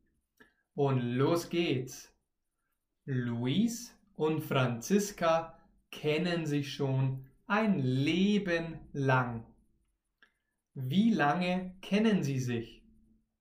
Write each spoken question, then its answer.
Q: Wie lange kennen sie sich?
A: Ein Leben lang.